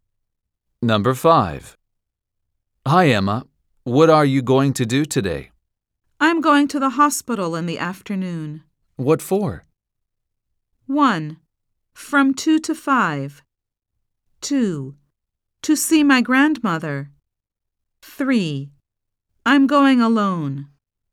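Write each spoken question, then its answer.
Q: What for?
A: 2: To see my grandmother.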